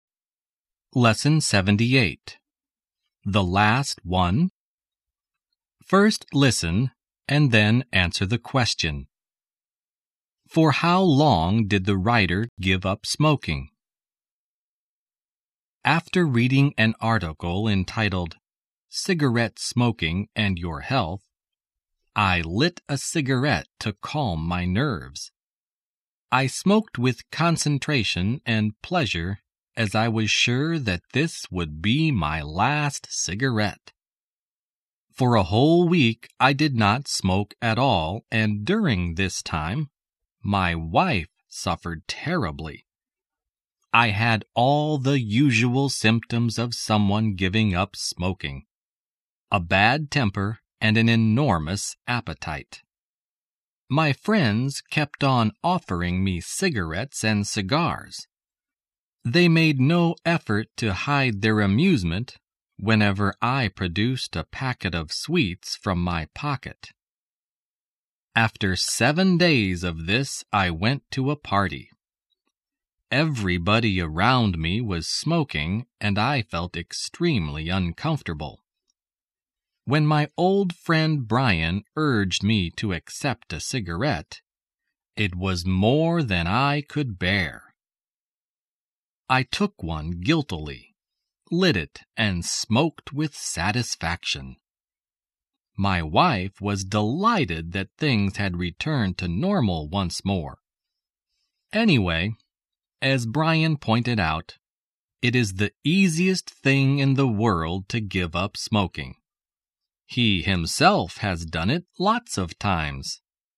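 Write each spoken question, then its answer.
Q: For how long did the writer give up smoking?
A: For a whole week (7 days)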